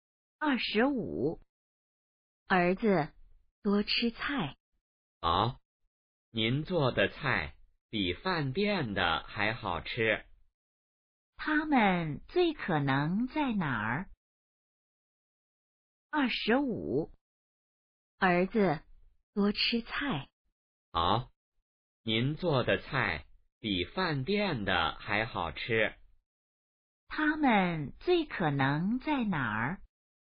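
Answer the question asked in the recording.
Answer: 家里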